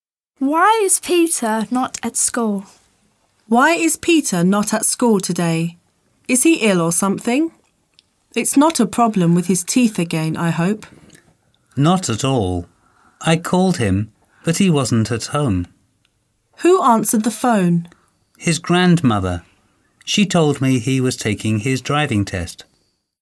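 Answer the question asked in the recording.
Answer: He is taking his driving test.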